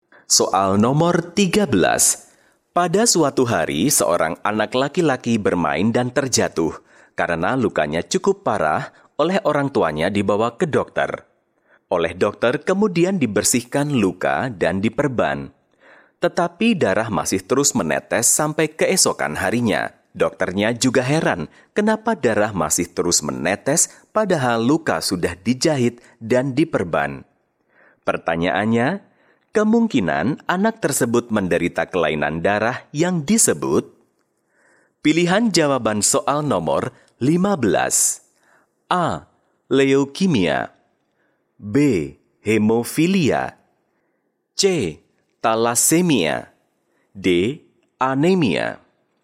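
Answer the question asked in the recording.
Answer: B: Hemofilia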